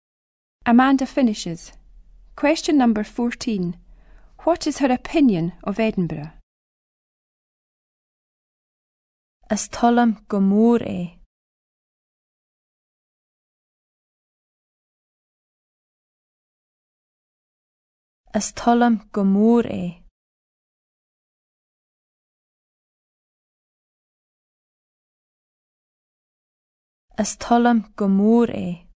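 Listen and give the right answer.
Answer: She likes it very much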